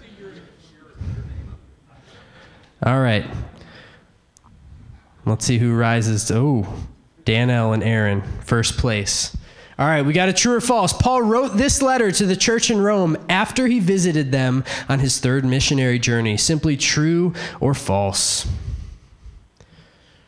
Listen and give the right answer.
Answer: All right, we had 35 false, and that is the correct answer